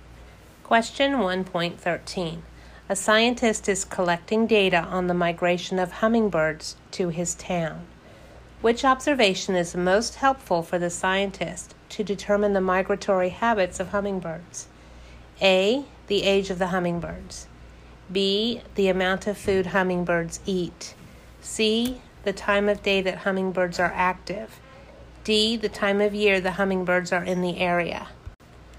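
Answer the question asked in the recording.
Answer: D: the time of year the hummingbirds are in the area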